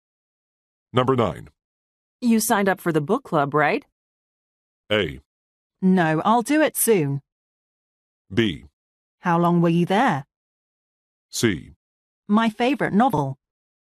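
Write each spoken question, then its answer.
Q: You signed up for the book club, right?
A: A: No, I'll do it soon.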